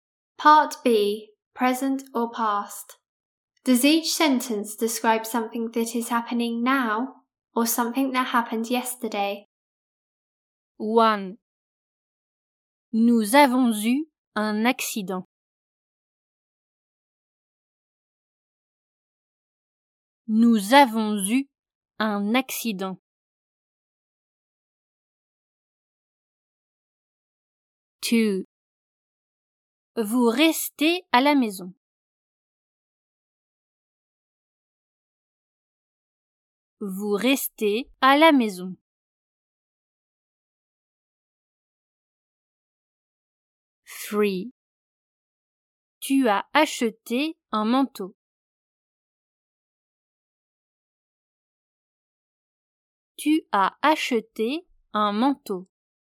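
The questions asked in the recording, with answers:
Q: Nous avons eu un accident.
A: happened yesterday

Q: Vous restez à la maison.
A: happening now

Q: Tu as acheté un manteau.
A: happened yesterday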